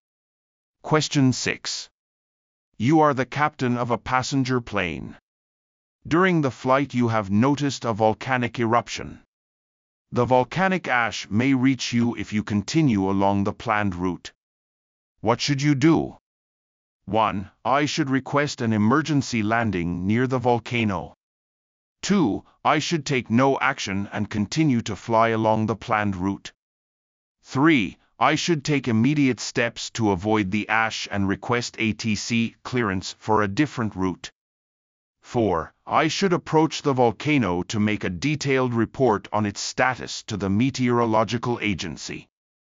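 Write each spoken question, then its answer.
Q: What should you do?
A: 3: I should take immediate steps to avoid the ash and request ATC clearance for a different route.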